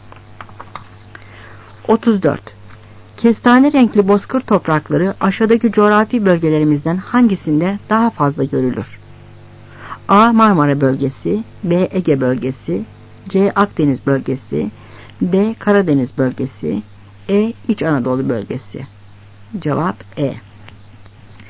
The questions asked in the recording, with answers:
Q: Kestane renkli bozkır toprakları aşağıdaki coğrafi bölgelerimizden hangisinde daha fazla görülür?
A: Cevap E.